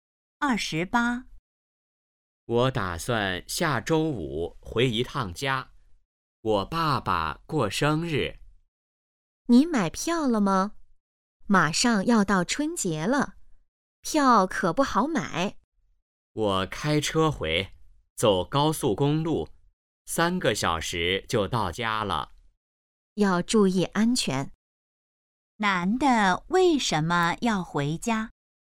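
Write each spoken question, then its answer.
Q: 男的为什么要回家?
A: 爸爸过生日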